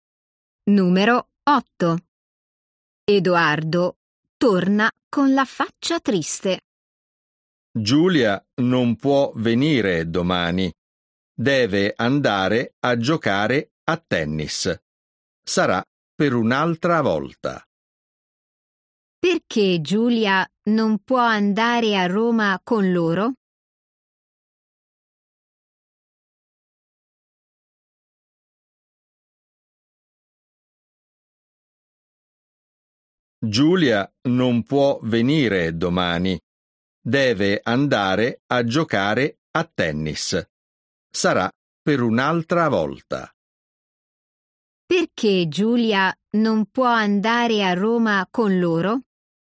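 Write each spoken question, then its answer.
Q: Perché Giulia non può andare a Roma con loro?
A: deve andare a giocare a tennis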